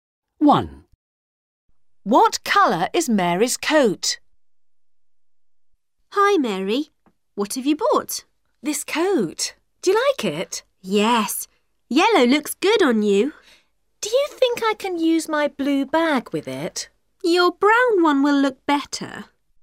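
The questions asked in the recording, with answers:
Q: What colour is Mary's coat?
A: Yellow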